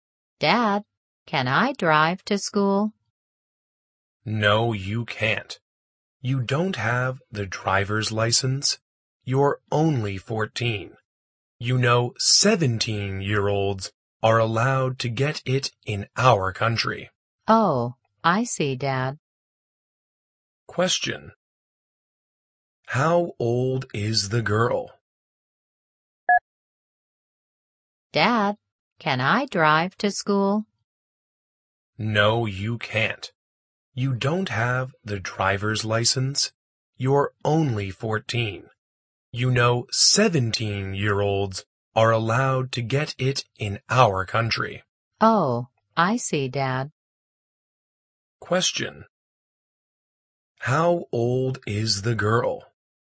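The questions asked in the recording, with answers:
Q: How old is the girl?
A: 14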